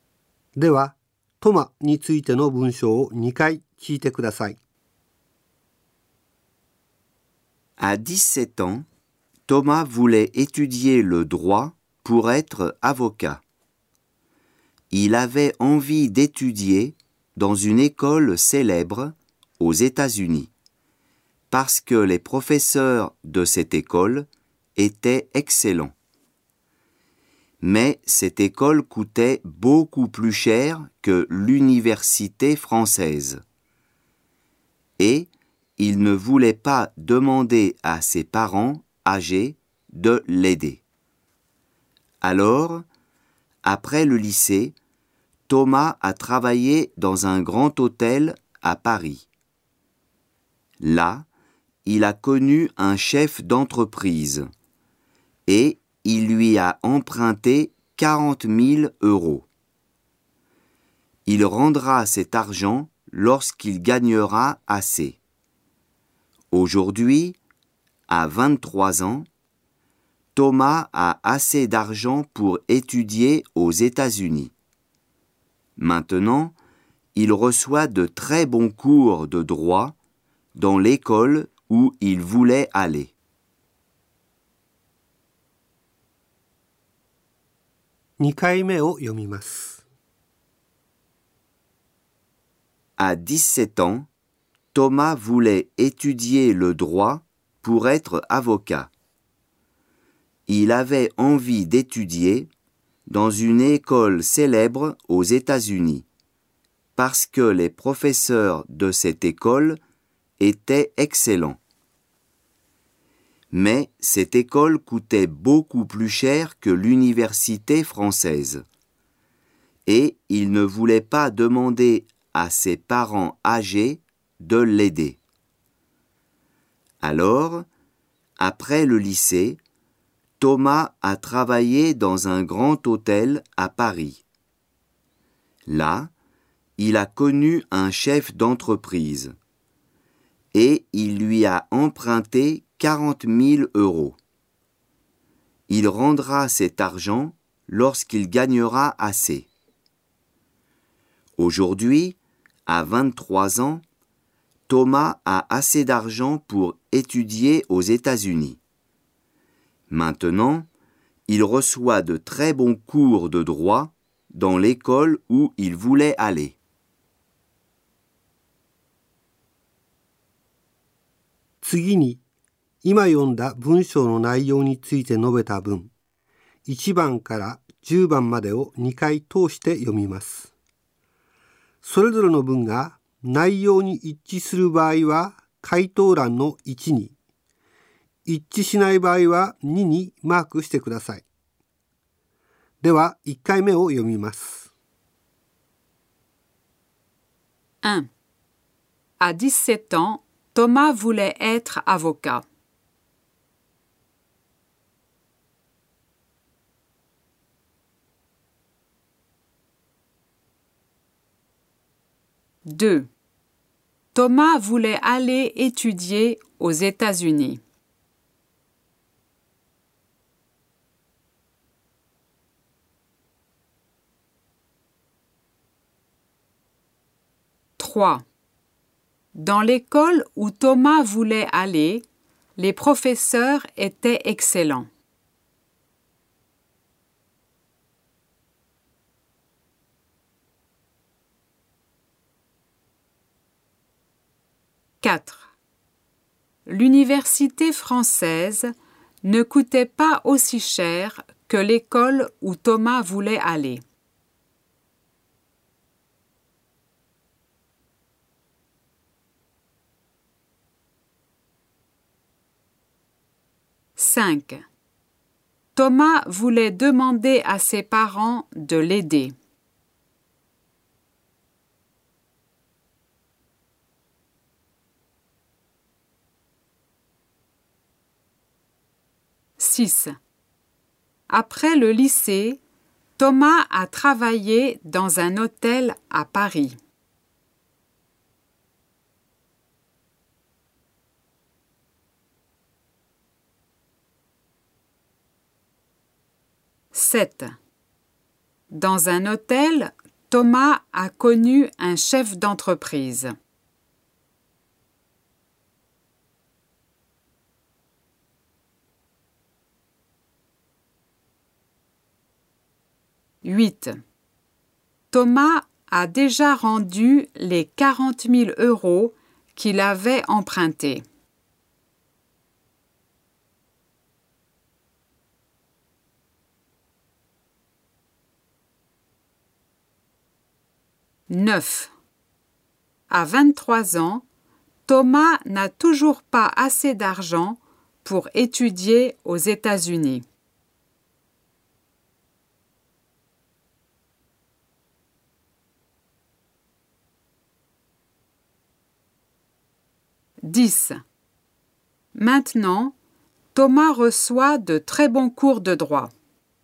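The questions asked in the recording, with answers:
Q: À 17 ans, Thomas voulait être avocat.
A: Vrai

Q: Thomas voulait aller étudier aux États-Unis.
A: Vrai

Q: Dans l'école où Thomas voulait aller, les professeurs étaient excellents.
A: Vrai

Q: L'université française ne coûtait pas aussi cher que l'école où Thomas voulait aller.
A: Vrai

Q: Thomas voulait demander à ses parents de l'aider.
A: Faux

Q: Après le lycée, Thomas a travaillé dans un hôtel à Paris.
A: Vrai

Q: Dans un hôtel, Thomas a connu un chef d'entreprise.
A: Vrai

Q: Thomas a déjà rendu les 40 000 euros qu'il avait empruntés.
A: Faux

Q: À 23 ans, Thomas n'a toujours pas assez d'argent pour étudier aux États-Unis.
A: Faux

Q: Maintenant, Thomas reçoit de très bons cours de droit.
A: Vrai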